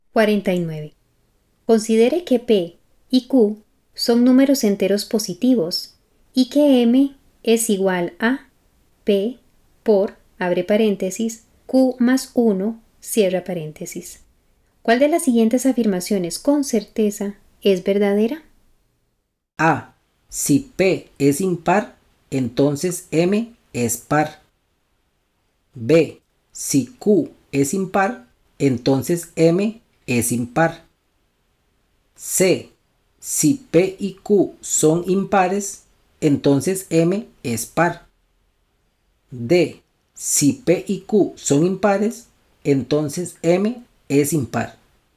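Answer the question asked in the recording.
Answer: C: Si P y Q son impares, entonces M es par.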